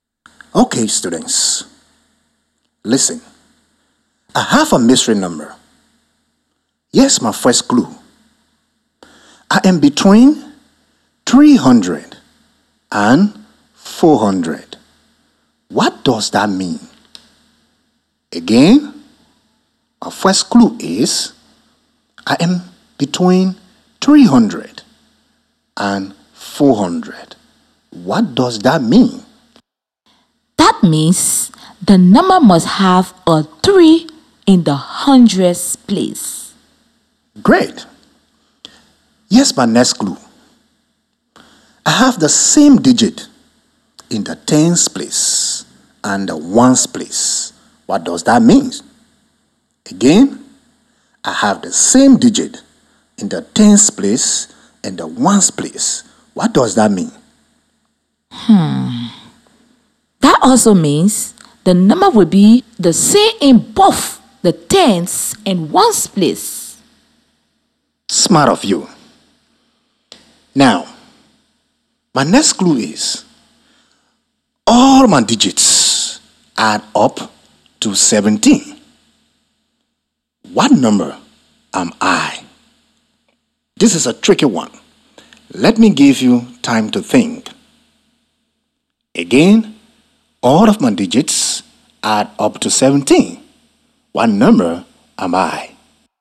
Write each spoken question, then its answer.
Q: What number am I?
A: The number has to be 377.